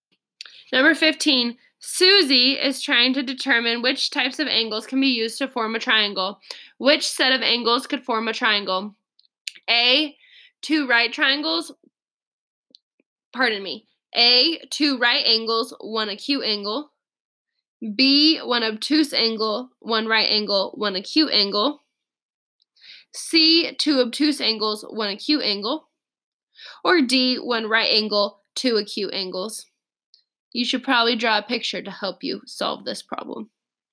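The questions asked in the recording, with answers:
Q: Which set of angles could form a triangle?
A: D: one right angle, two acute angles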